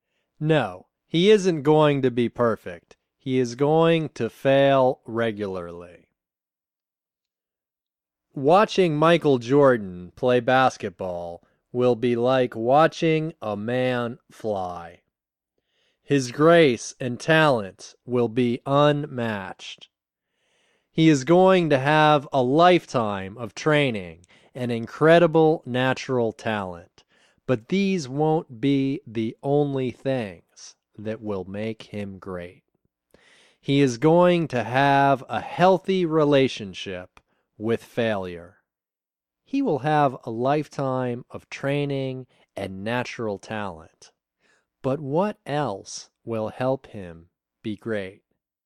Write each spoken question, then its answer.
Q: But what else will help him be great?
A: He is going to have a healthy relationship with failure.